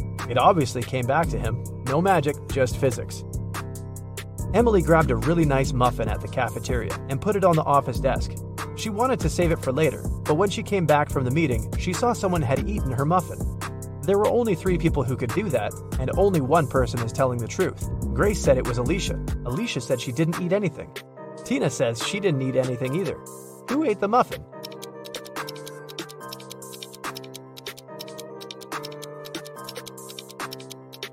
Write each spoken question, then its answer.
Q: Who ate the muffin?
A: It was Tina.